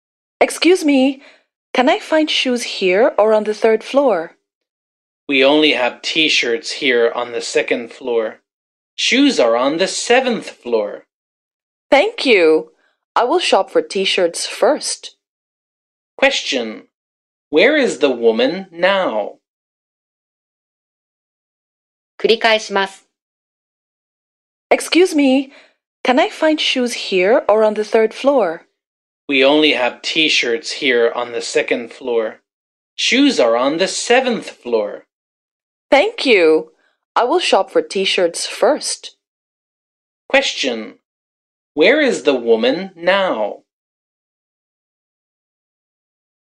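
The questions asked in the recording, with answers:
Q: Where is the woman now?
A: On the second floor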